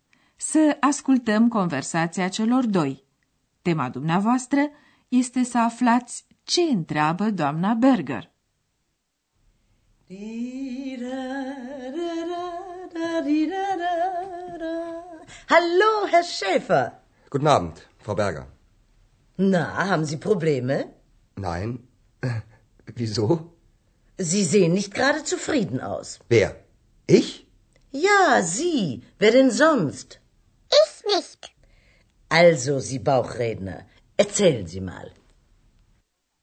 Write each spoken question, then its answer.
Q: Tema dumneavoastră este să aflați ce întreabă doamna Berger.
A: Domna Berger îl întreabă așadar pe Andreas dacă are probleme.